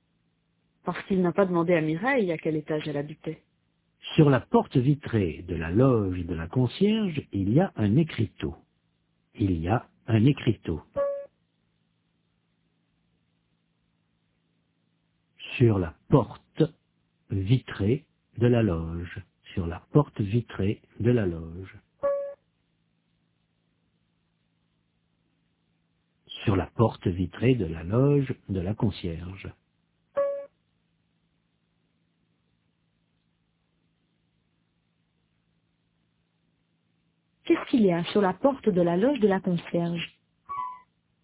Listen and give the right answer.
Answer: Un écriteau.